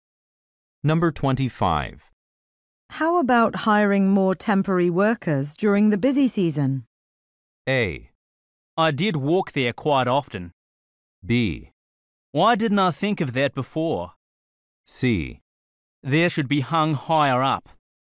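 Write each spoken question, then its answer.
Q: How about hiring more temporary workers during the busy season?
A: B: Why didn't I think of that before?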